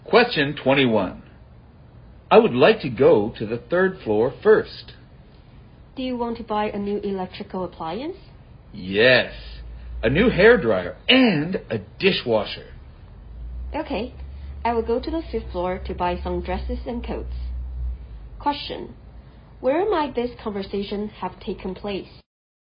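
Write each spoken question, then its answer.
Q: Where might this conversation have taken place?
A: In a department store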